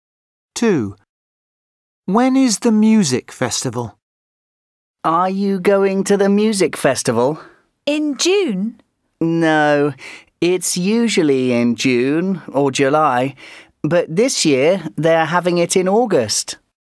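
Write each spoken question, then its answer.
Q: When is the music festival?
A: in August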